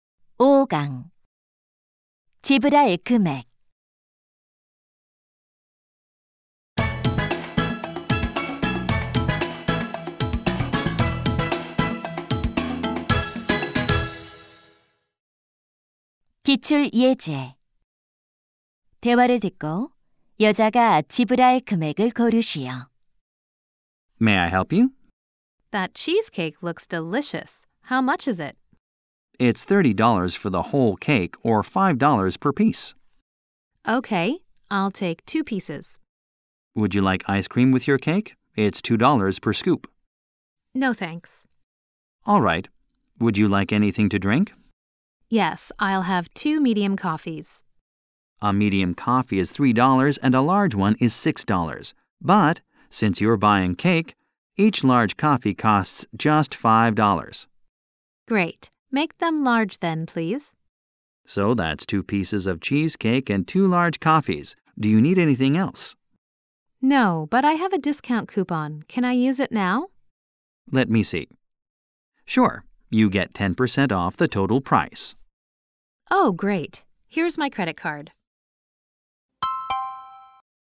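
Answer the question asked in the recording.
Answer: $18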